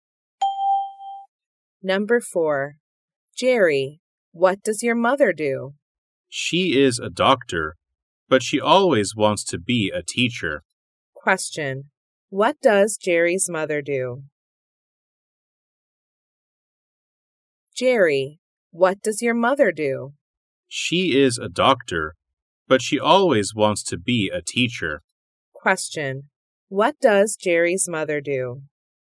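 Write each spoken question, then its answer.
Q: What does Jerry's mother do?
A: She is a doctor.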